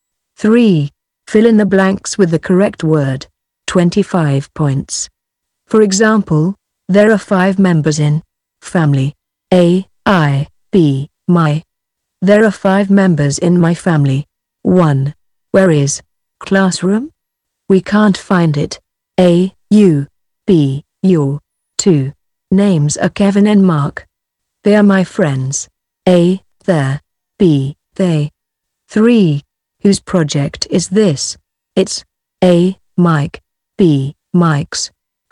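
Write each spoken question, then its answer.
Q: Where is classroom? We can't find it.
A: B: Your

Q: Whose project is this?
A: B: Mike's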